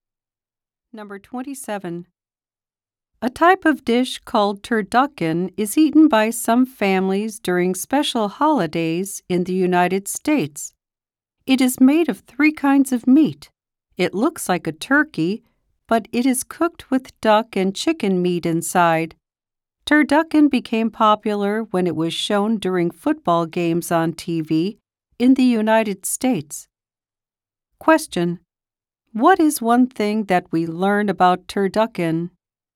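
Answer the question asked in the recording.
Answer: It is made of three kinds of meat.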